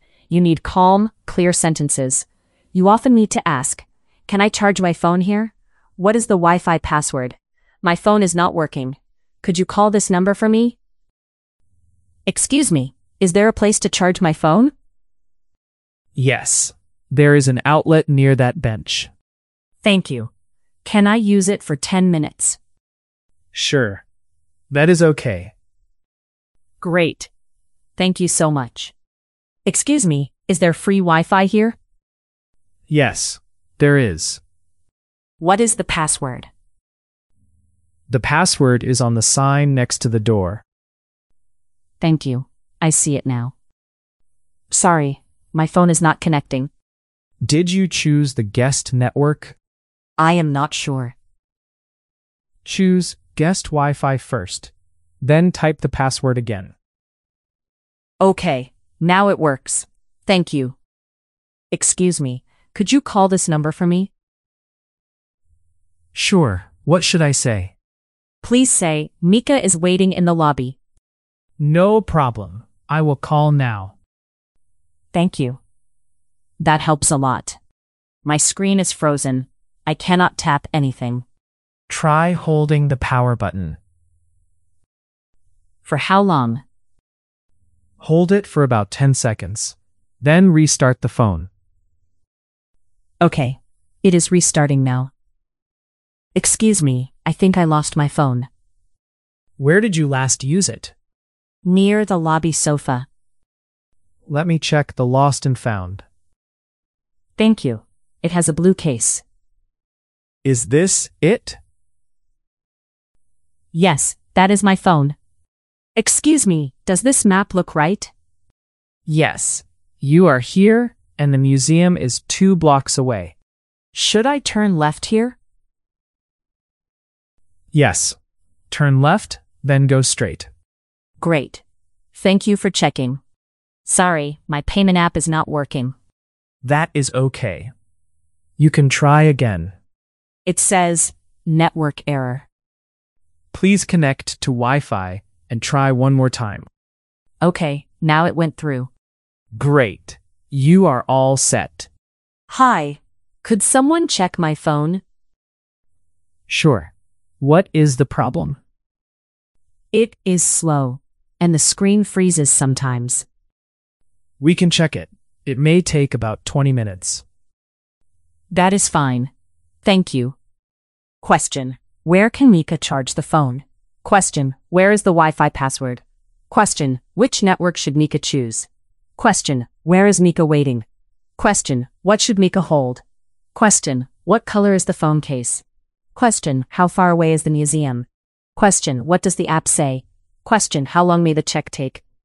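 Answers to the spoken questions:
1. At an outlet near the bench
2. On the sign next to the door
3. The guest network
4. In the lobby
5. The power button
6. Blue
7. 2 blocks
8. Network error
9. About 20 minutes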